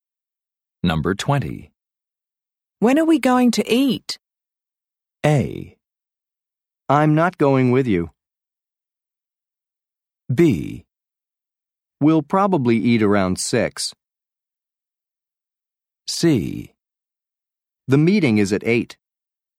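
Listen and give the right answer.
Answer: B: We'll probably eat around 6.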